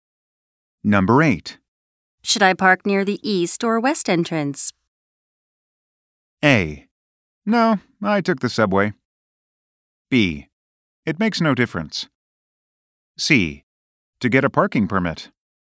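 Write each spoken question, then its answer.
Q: Should I park near the east or west entrance?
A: B: It makes no difference.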